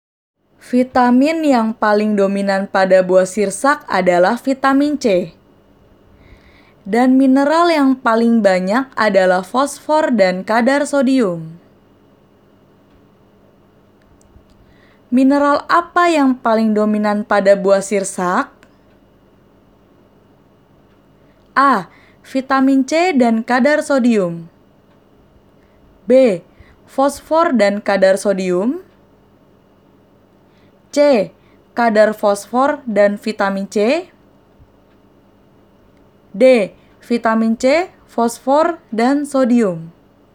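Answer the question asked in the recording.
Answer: B: Fosfor dan kadar sodium.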